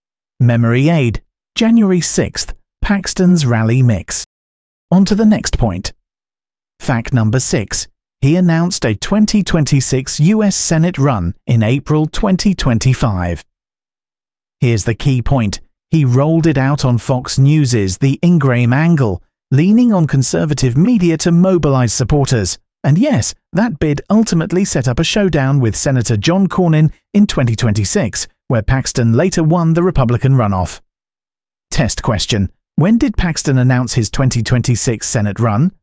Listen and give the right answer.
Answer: Correct answer? April 2025.